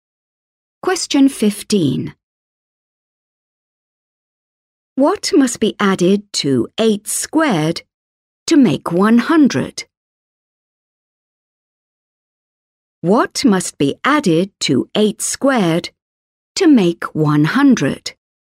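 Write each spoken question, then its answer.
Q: What must be added to 8 squared to make 100?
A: 36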